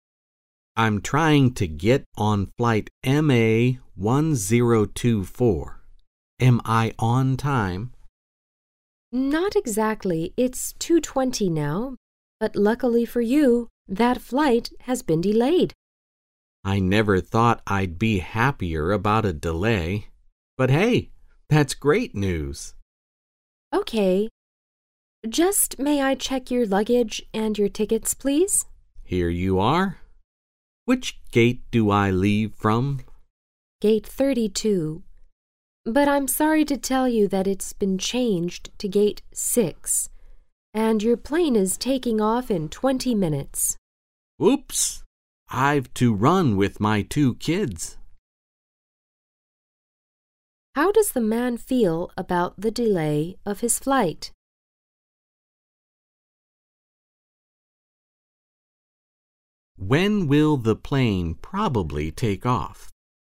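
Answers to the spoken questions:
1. Happy
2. At 2:40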